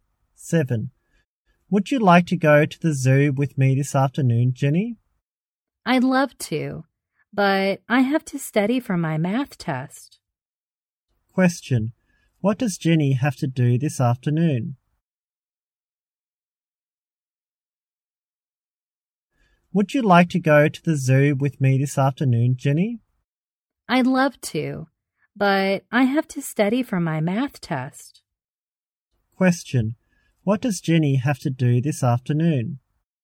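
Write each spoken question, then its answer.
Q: Question. What does Jenny have to do this afternoon?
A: Study for her math test.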